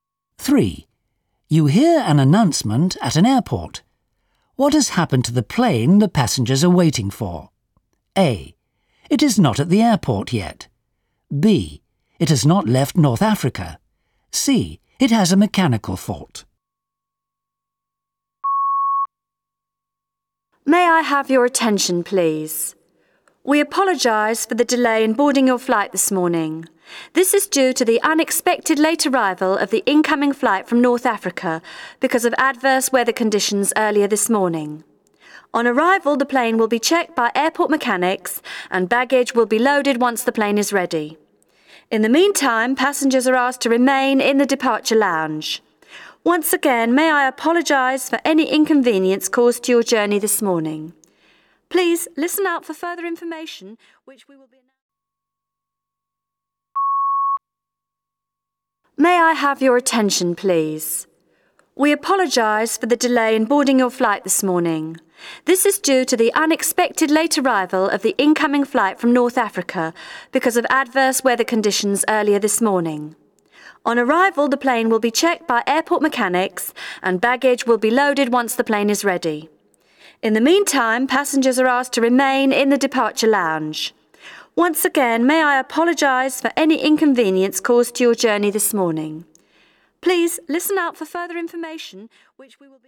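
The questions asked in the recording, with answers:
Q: What has happened to the plane the passengers are waiting for?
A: A: It is not at the airport yet.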